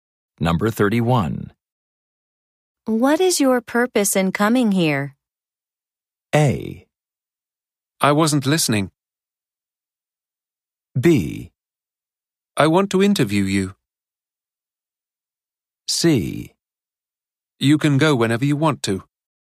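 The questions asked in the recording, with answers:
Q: What is your purpose in coming here?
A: B: I want to interview you.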